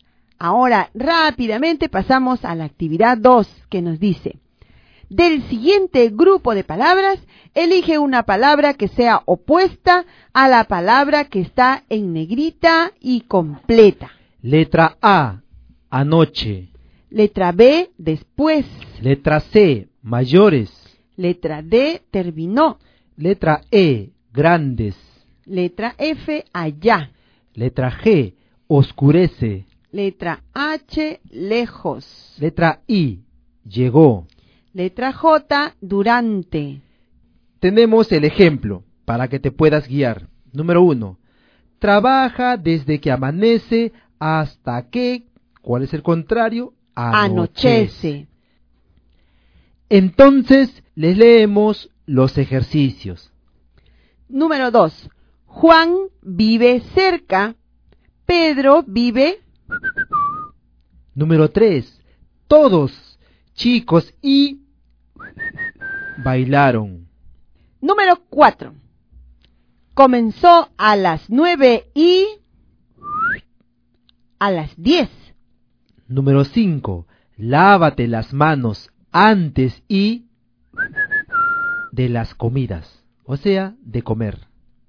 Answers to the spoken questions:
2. La alternativa H.
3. han tenido que marcar la alternativa E.
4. La palabra correcta era la alternativa D.
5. La alternativa correcta era la letra B.